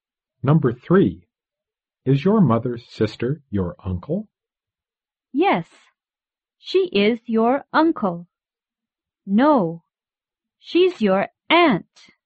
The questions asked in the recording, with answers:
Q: Is your mother's sister your uncle?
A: No, your mother's sister is your aunt.